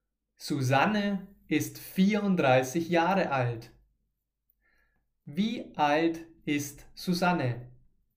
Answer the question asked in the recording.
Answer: Vierunddreißig.